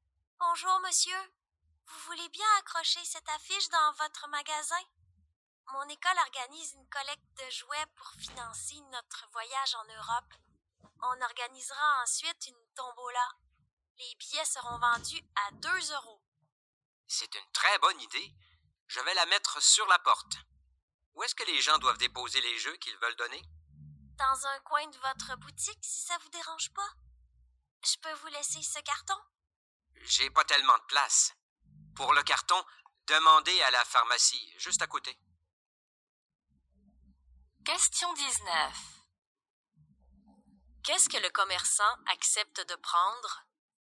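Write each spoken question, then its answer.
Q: Qu'est-ce que le commerçant accepte de prendre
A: l'affiche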